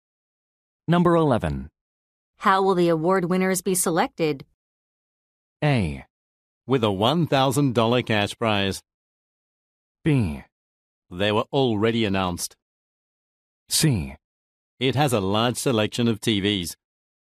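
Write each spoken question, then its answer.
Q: How will the award winners be selected?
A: B: They were already announced.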